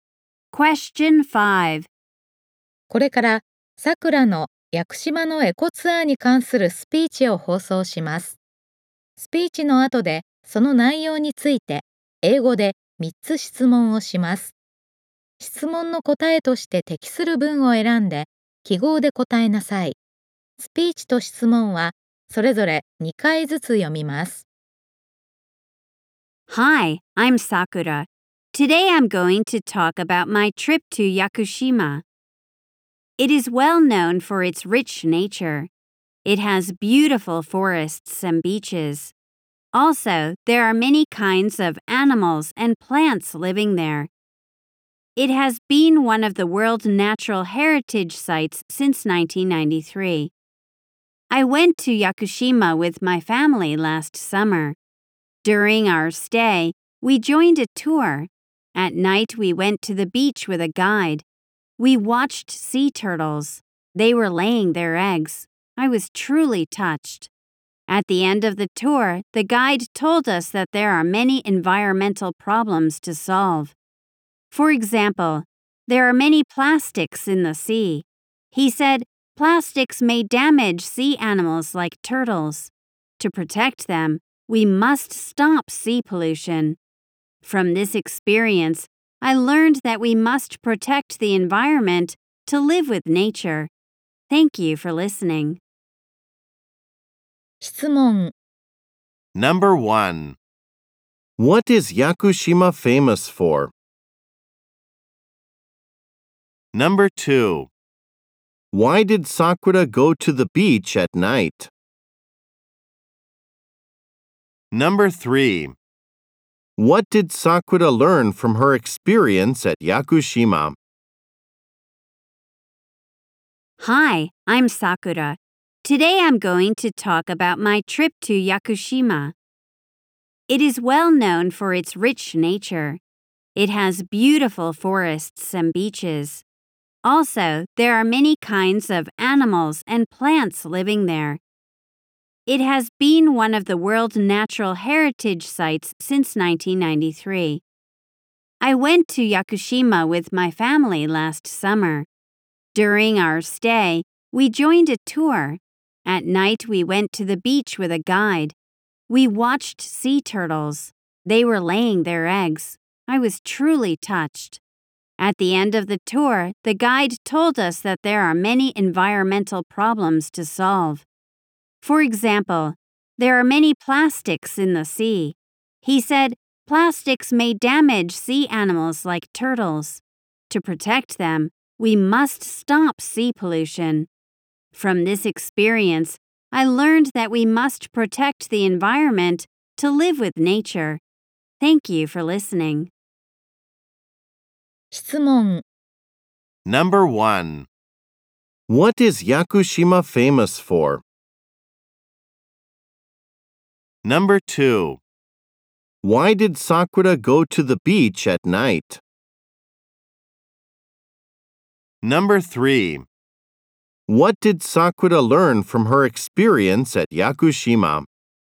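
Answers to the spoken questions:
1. Its rich nature.
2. To watch sea turtles.
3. We must protect the environment to live with nature.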